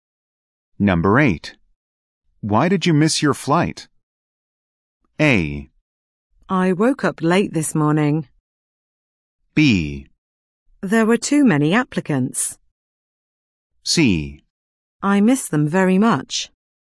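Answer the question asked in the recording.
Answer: A: I woke up late this morning.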